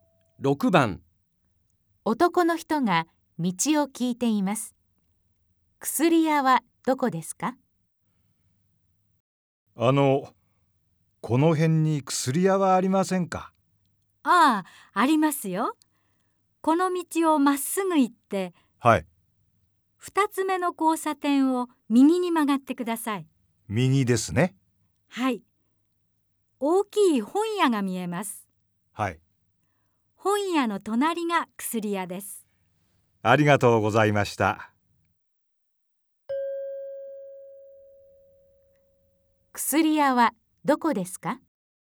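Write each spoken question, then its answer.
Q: 薬屋はどこですか?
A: 2つ目の交差点を右に曲がったところにある、大きい本屋の隣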